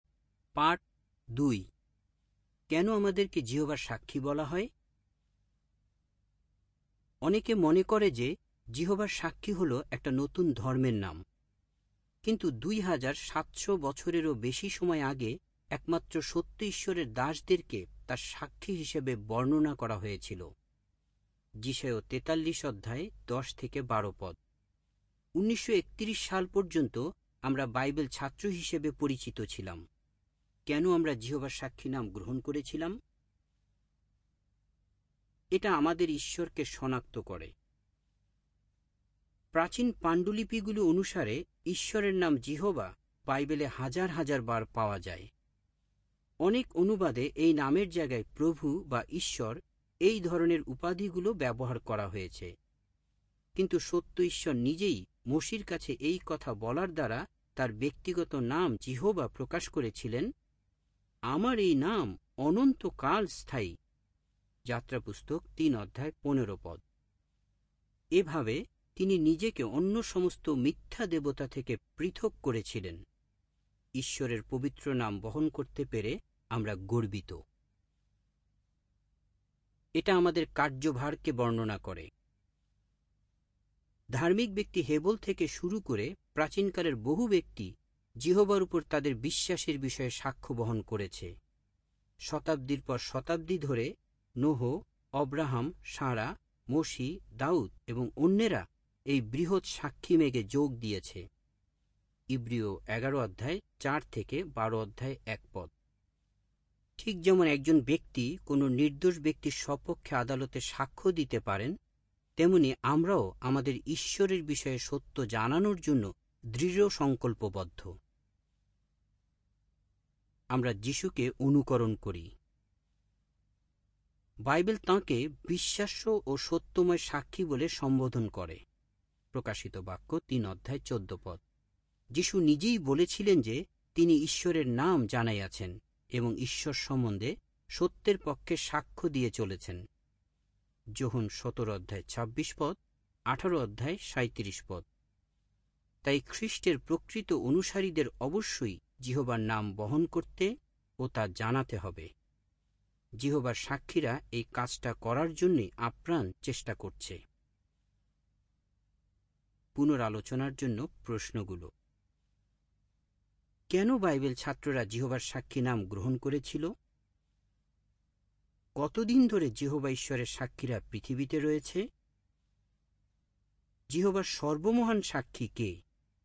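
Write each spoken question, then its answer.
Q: কেন Bible ছাত্ররা যিহোবার সাক্ষী নাম গ্রহণ করেছিল?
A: কারণ এই নাম তাদের ঈশ্বর যিহোবাকে শনাক্ত করে, তাদের কার্যভারকে বর্ণনা করে এবং তারা যিশুকে অনুকরণ করে

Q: কতদিন ধরে যিহোবা ঈশ্বরের সাক্ষীরা পৃথিবীতে রয়েছে?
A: হেবলের সময় থেকে

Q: যিহোবার সর্বমহান সাক্ষী কে?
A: যিশু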